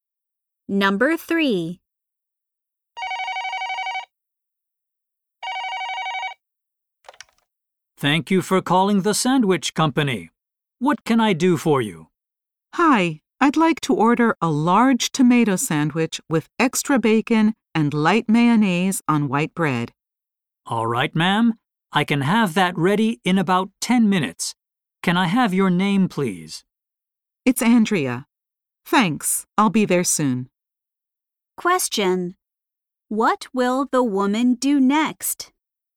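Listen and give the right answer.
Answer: Go to pick up her sandwich.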